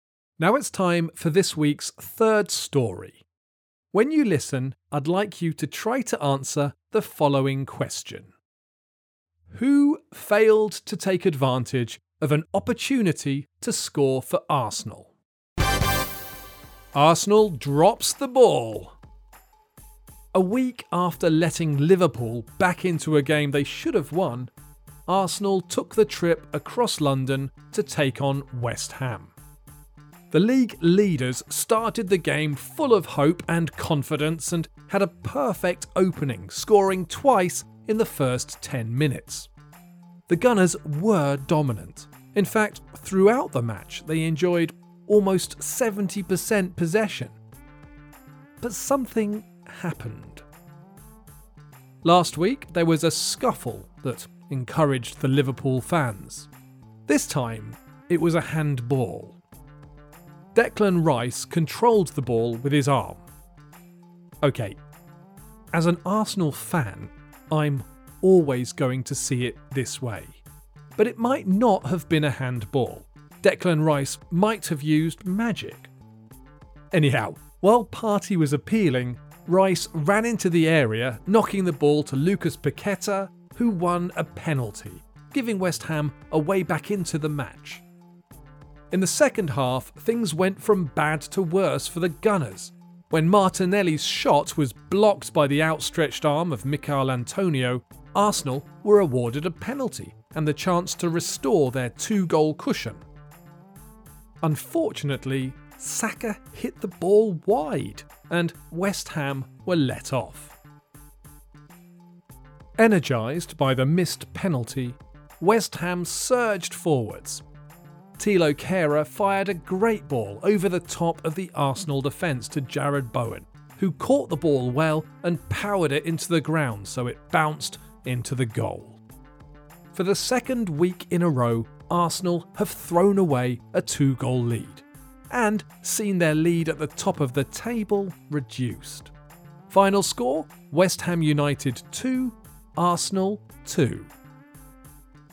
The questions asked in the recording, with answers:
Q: Who failed to take advantage of an opportunity to score for Arsenal?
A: The answer is Bukayo Saka, who missed a crucial penalty.